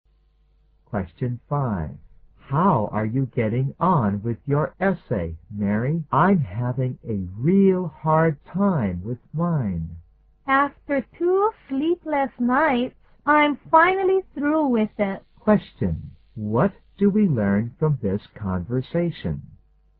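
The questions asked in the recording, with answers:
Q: What do we learn from this conversation?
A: Mary has finally finished her essay.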